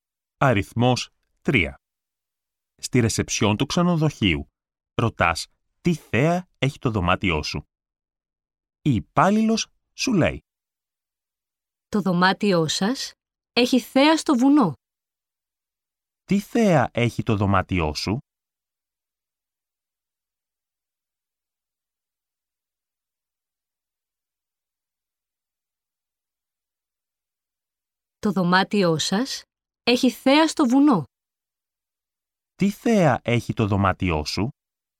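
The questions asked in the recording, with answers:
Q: Τι θέα έχει το δωμάτιό σου?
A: Θέα στο βουνό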